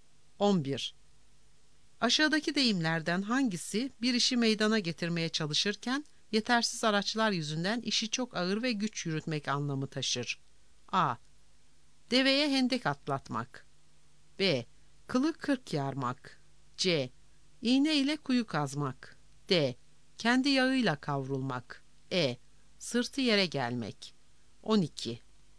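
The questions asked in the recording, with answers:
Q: Aşağıdaki deyimlerden hangisi bir işi meydana getirmeye çalışırken yetersiz araçlar yüzünden işi çok ağır ve güç yürütmek anlamı taşır?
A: C: İğne ile kuyu kazmak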